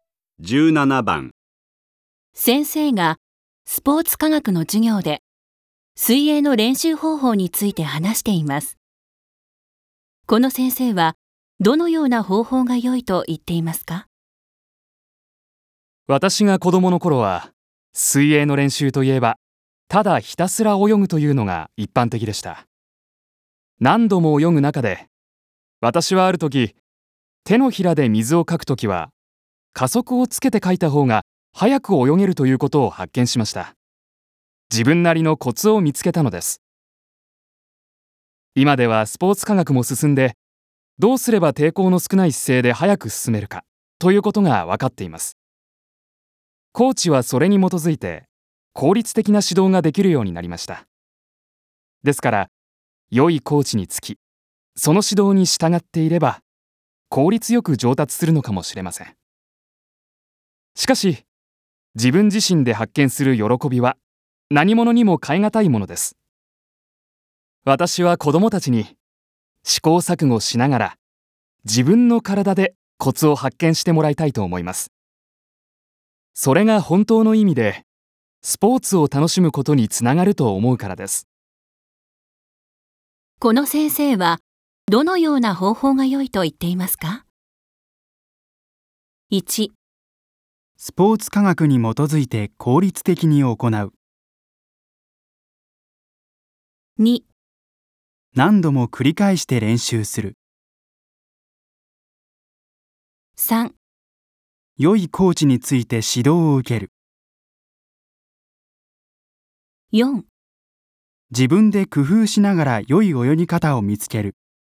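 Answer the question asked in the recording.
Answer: 4: 自分で工夫しながら良い泳ぎ方を見つける。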